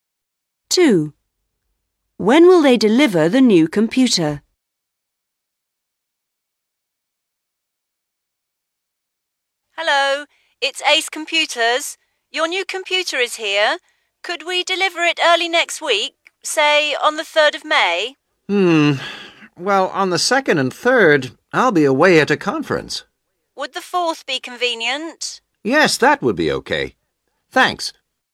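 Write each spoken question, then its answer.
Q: When will they deliver the new computer?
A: On the 4th of May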